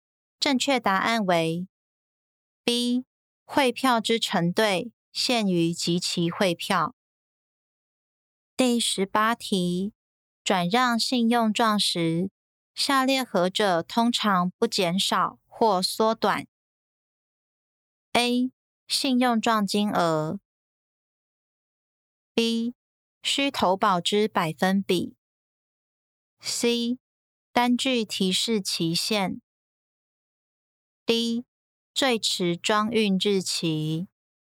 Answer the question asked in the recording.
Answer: 正确答案为 B. 需投保之百分比。